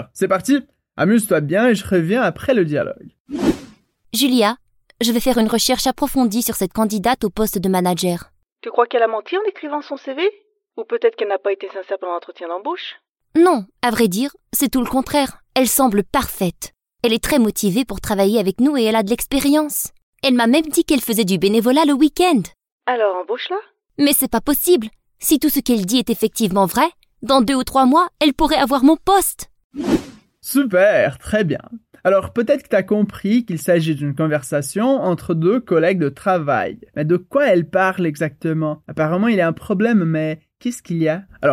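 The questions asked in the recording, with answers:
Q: Mais de quoi elle parle exactement ?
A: D'une candidate au poste de manager qui semble parfaite : motivée, expérimentée et bénévole le week-end.

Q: Apparemment, il y a un problème, mais qu'est-ce qu'il y a ?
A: La candidate semble si parfaite que, dans 2 ou 3 mois, elle pourrait prendre le poste de la collègue.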